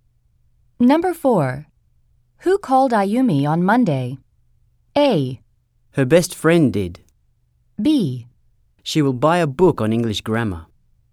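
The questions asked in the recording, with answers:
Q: Who called Ayumi on Monday?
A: A: Her best friend did.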